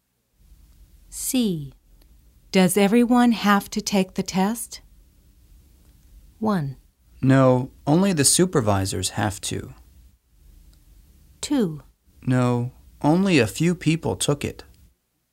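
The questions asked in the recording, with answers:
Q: Does everyone have to take the test?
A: 1: No, only the supervisors have to.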